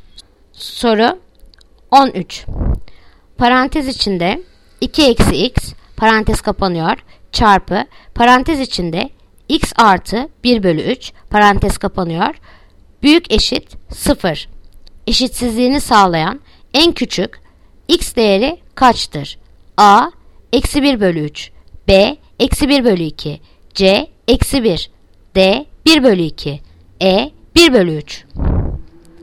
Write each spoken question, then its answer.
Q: Büyük eşit 0. Eşitsizliğini sağlayan en küçük x değeri kaçtır?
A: Yanıt Adana eksi 1 bölü 3.